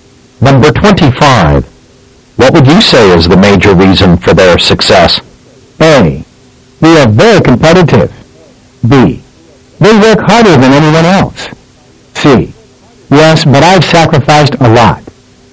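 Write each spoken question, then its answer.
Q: What would you say is the major reason for their success?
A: B: They work harder than anyone else.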